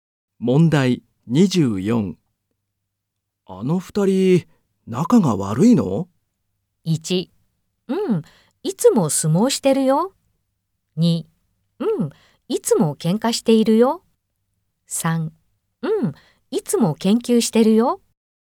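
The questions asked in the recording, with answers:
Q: あの二人、仲が悪いの?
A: 1: うん、いつも喧嘩しているよ。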